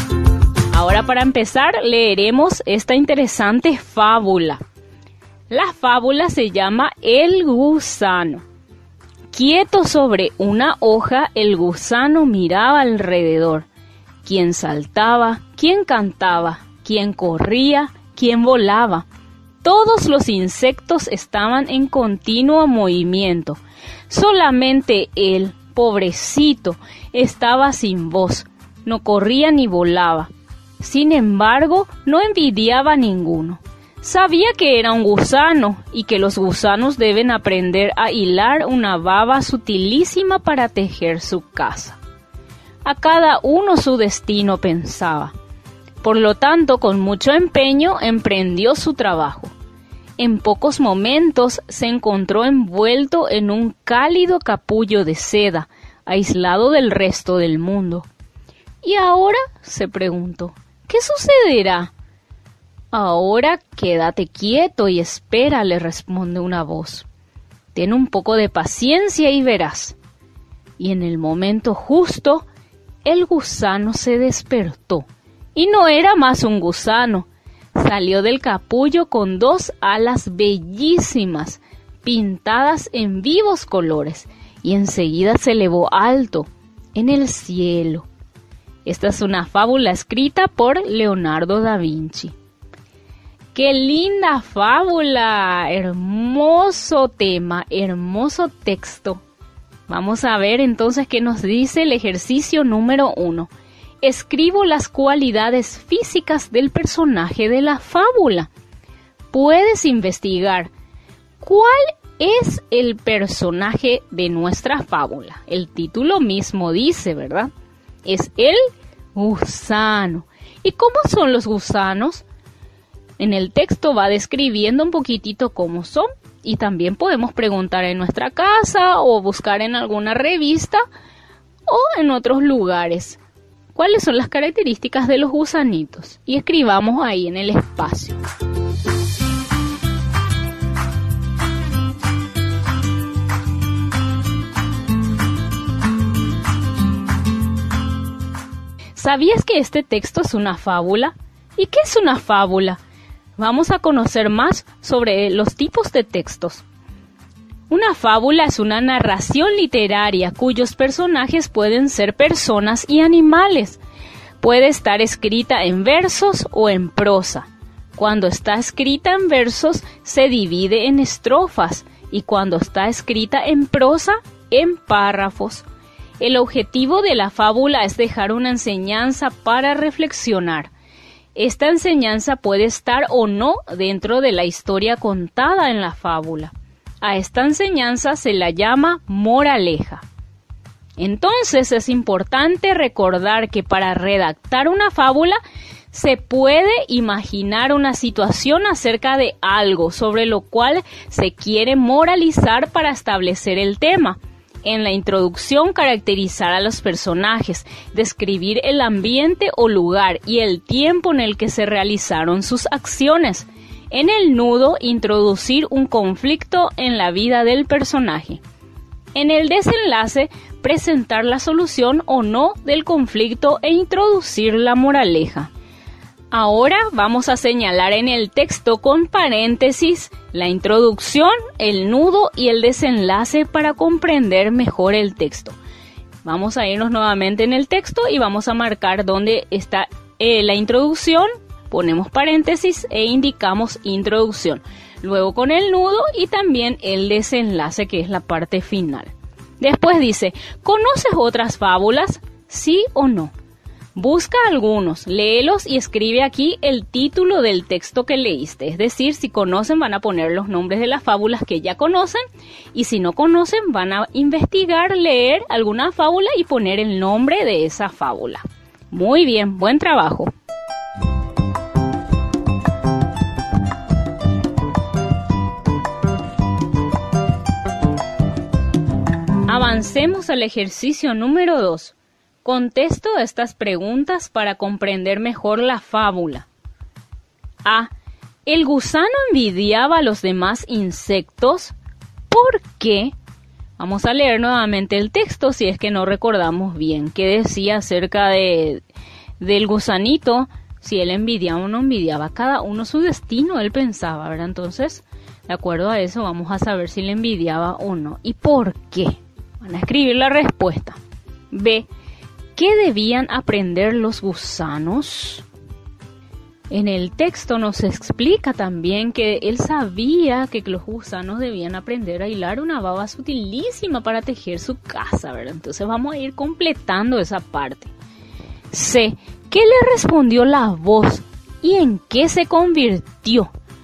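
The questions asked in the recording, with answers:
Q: ¿El gusano envidiaba a los demás insectos?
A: No, porque sabía que era un gusano y que a cada uno su destino

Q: ¿Qué debían aprender los gusanos?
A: él sabía que los gusanos debían aprender a hilar una baba sutilísima para tejer su casa

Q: ¿Qué le respondió la voz y en qué se convirtió?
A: Quédate quieto y espera, ten un poco de paciencia y verás; se convirtió en mariposa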